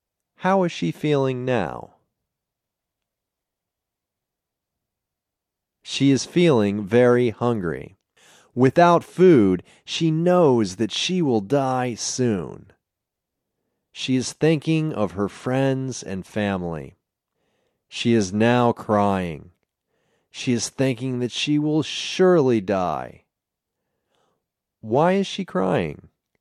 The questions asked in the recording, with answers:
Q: Why is she crying?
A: She is crying because she thinks that she will surely die.